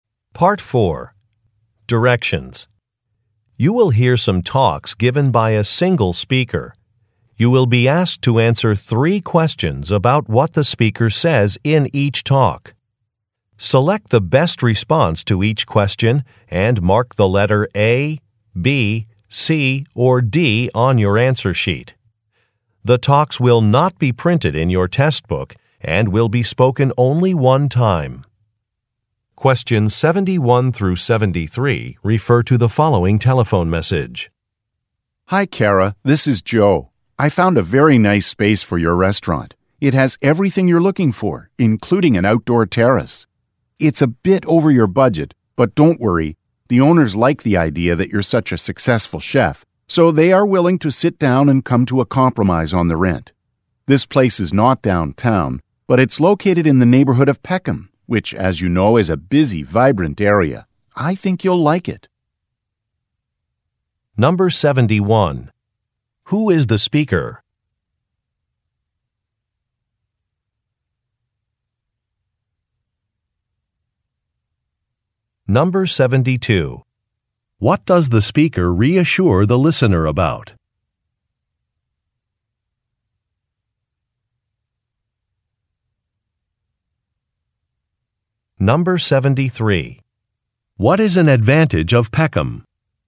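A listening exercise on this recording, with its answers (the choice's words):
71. Who is the speaker?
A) An investment banker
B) An attorney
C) A real estate agent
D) An architect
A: A real estate agent

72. What does the speaker reassure the listener about?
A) A price is negotiable.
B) Some supplies have arrived.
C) A job applicant is qualified.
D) Clients are satisfied.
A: A price is negotiable.

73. What is an advantage of Peckham?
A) It has beautiful scenery.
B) It has several parks.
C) It is a safe neighborhood.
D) It is popular.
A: It is popular.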